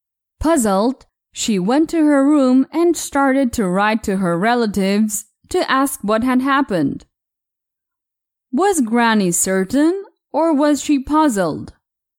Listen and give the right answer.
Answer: Puzzled. Granny was puzzled.